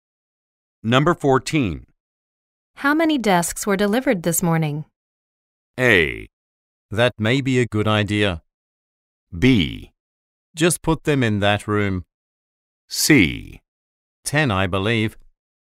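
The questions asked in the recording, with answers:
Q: How many desks were delivered this morning?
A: C: 10, I believe.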